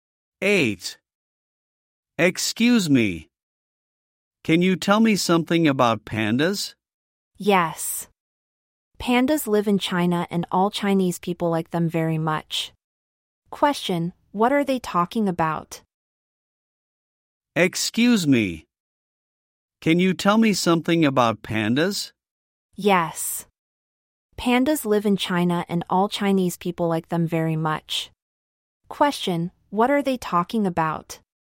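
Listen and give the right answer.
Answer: Pandas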